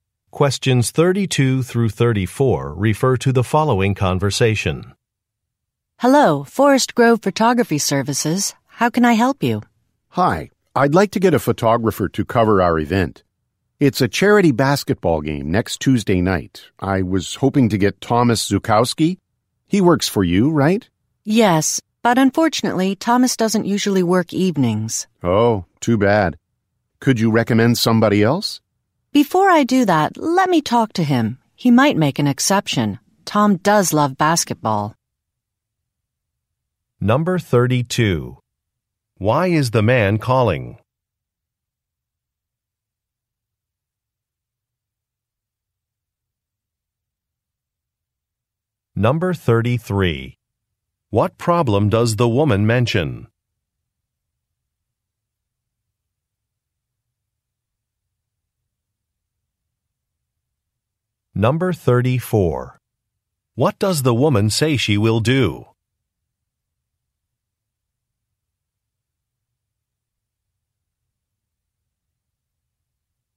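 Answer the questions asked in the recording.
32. To hire a photographer for a charity basketball game
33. Thomas doesn't usually work evenings
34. Talk to Thomas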